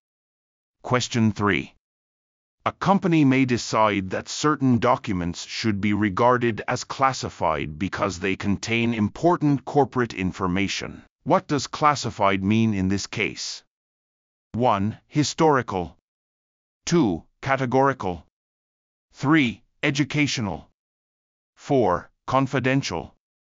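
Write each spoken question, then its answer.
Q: What does classified mean in this case?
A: 4: Confidential.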